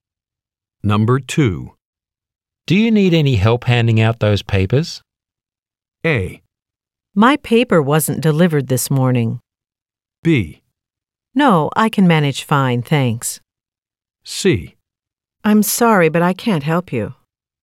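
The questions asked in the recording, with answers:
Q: Do you need any help handing out those papers?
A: B: No, I can manage fine, thanks.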